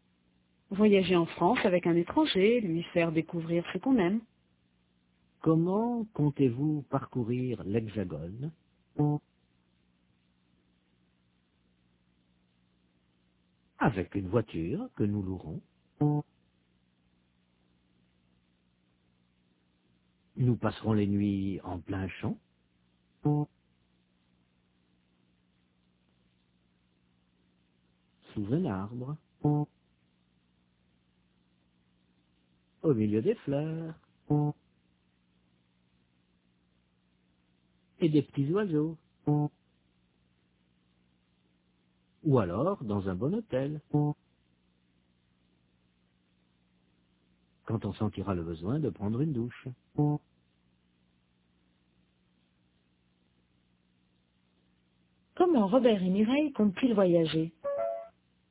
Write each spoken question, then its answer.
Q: Comment Robert et Mireille comptent-ils voyager ?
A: Avec une voiture qu'ils loueront.